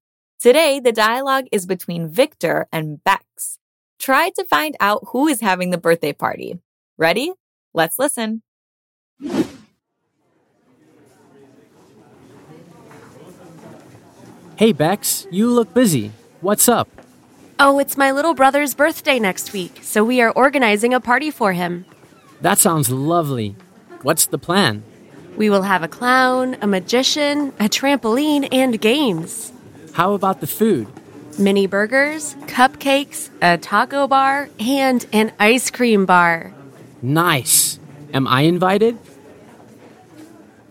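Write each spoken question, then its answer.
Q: Try to find out who is having the birthday party.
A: Bex's little brother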